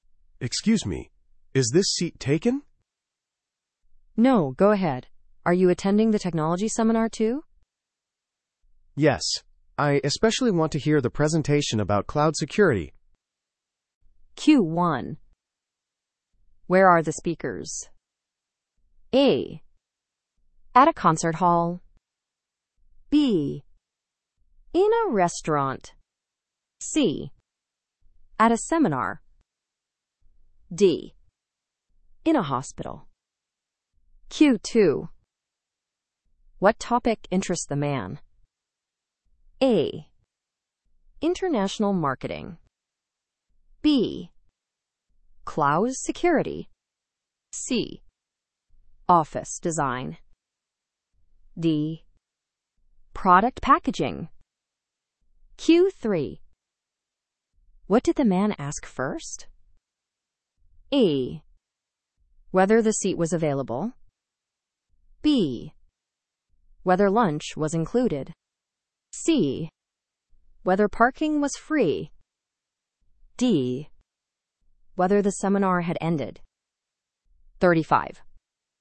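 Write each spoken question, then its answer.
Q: Where are the speakers?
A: C: At a seminar.

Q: What topic interests the man?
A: B: Cloud security.

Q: What did the man ask first?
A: A: Whether the seat was available.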